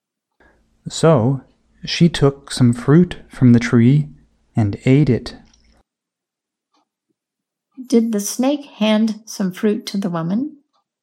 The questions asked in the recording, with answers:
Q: Did the snake hand some fruit to the woman?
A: No, the snake did not hand some fruit to the woman.